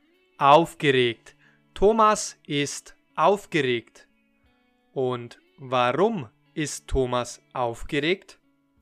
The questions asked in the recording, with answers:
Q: Und Warum ist Thomas aufgeregt?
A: Weil er nächsten Freitag seine Schwiegermutter kennenlernen wird.